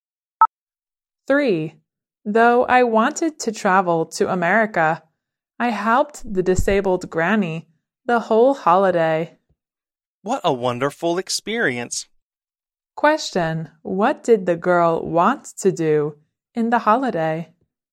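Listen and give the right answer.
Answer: Travel to America.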